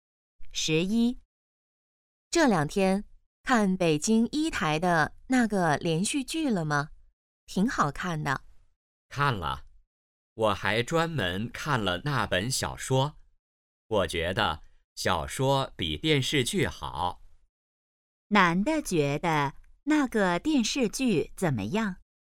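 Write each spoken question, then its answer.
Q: 男的觉得那个电视剧怎么样?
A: 不如小说好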